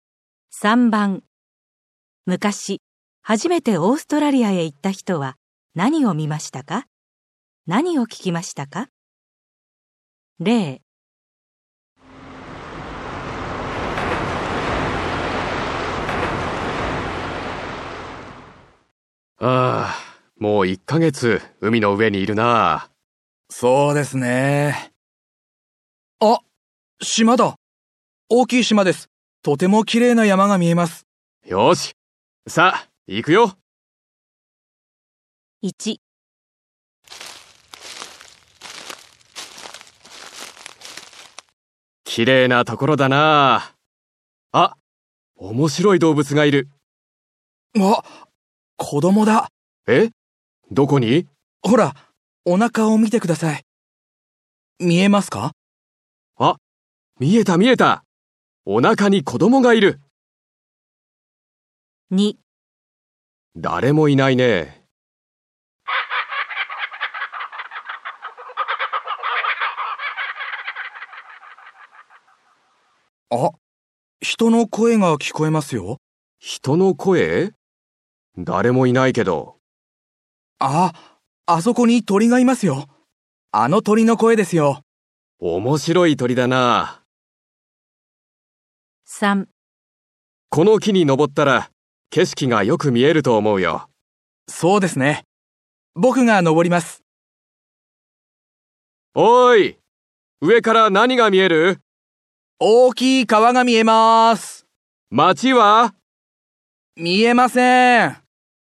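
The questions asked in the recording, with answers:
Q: 昔、初めてオーストラリアへ行った人は何を見ましたか?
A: お腹に子供がいる面白い動物

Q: 何を聞きましたか?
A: 人の声のように聞こえる鳥の声

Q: 昔、初めてオーストラリアへ行った人は何を見ましたか?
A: 大きい川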